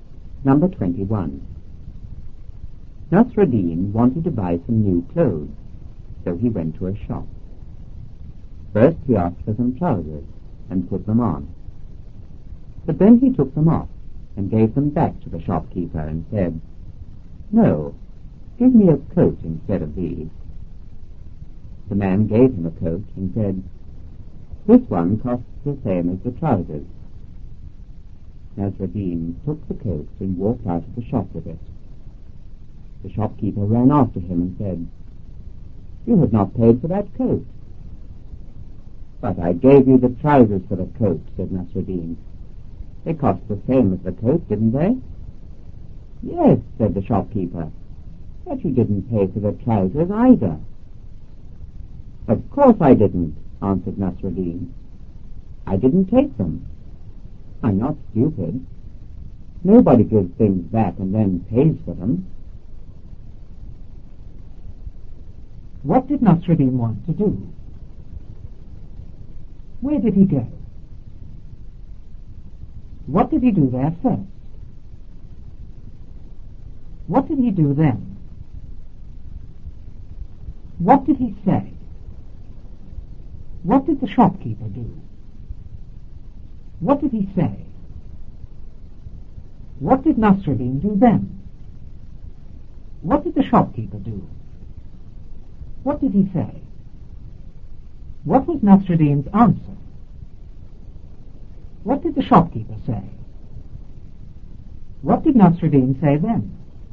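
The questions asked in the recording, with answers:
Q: What did Nasruddin want to do?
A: Buy some new clothes

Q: Where did he go?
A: To a shop

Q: What did he do there first?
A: He asked for some trousers and put them on

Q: What did he do then?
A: He took them off and gave them back to the shopkeeper

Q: What did he say?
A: "No, give me a coat instead of these."

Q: What did the shopkeeper do?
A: He gave him a coat

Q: What did he say?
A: "This one costs the same as the trousers."

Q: What did Nasruddin do then?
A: He took the coat and walked out of the shop with it

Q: What did the shopkeeper do?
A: He ran after him

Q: What did he say?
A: "You have not paid for that coat."

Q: What was Nasruddin's answer?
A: "But I gave you the trousers for the coat. They cost the same as the coat, didn't they?"

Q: What did the shopkeeper say?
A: "Yes, but you didn't pay for the trousers either."

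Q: What did Nasruddin say then?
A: "Of course I didn't. I didn't take them. I'm not stupid. Nobody gives things back and then pays for them."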